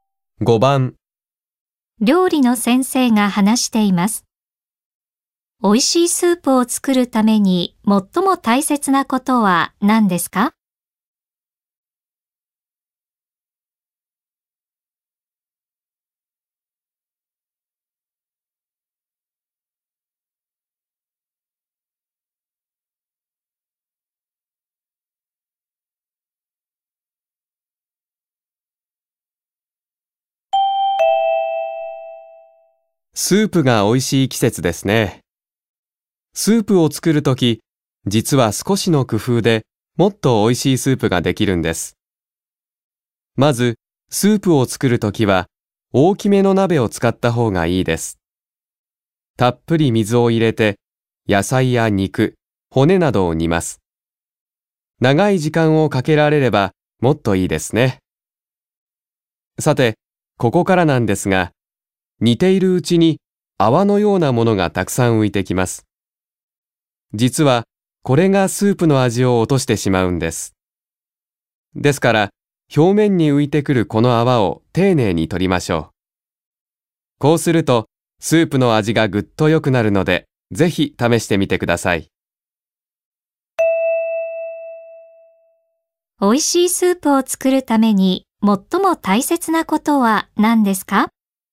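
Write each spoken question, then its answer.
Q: 美味しいスープを作るために最も大切なことは何ですか?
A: 表面に浮いてくる泡を丁寧に取ること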